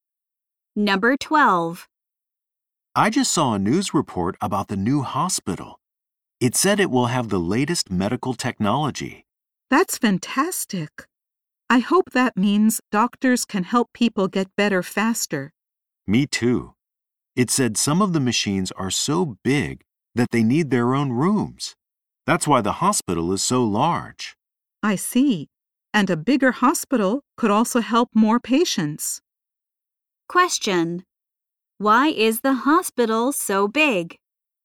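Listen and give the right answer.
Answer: Some machines are so big they need their own rooms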